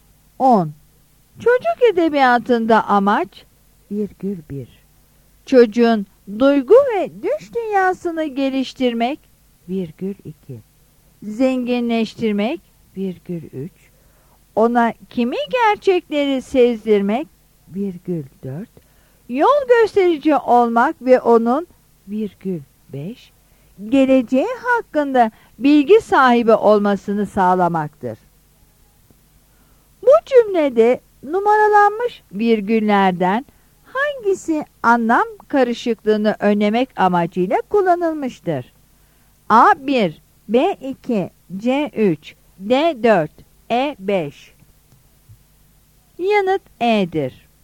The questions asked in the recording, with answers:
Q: Bu cümlede numaralanmış virgüllerden hangisi anlam karışıklığını önlemek amacıyla kullanılmıştır?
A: Yanıt E'dir.